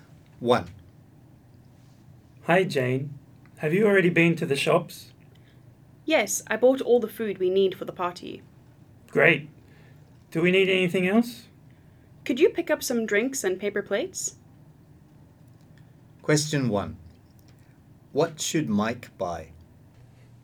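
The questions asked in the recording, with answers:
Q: What should Mike buy?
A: Some drinks and paper plates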